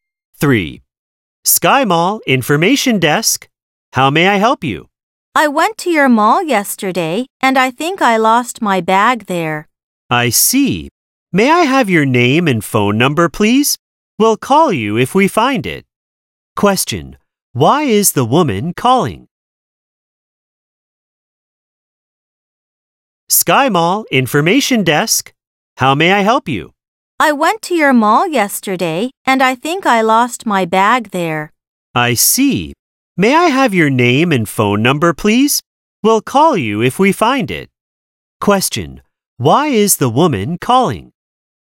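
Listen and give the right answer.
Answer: She thinks she lost her bag at the mall.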